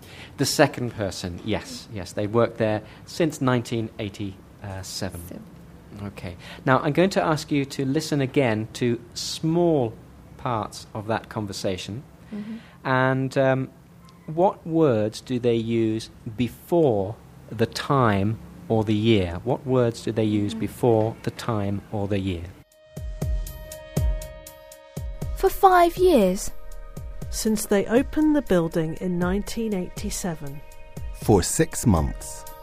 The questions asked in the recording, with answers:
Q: And what words do they use before the time or the year?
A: For and since is the right answer